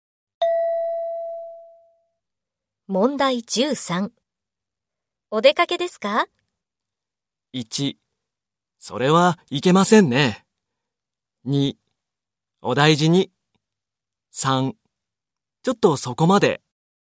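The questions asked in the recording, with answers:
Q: お出かけですか?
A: 2: ちょっとそこまで。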